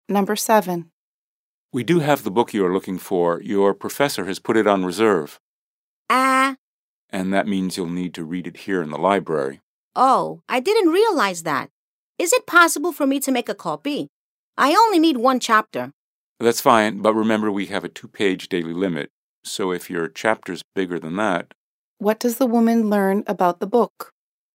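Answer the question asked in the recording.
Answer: Her professor put it on reserve, so she must read it in the library.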